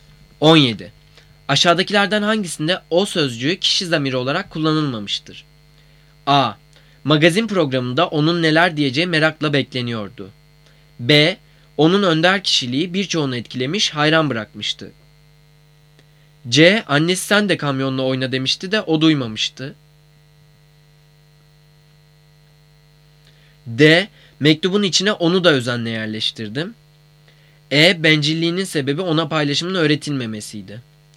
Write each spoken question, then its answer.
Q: Aşağıdakilerden hangisinde o sözcüğü kişi zamiri olarak kullanılmamıştır?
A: Cevap D. Mektubun içine onu da özenle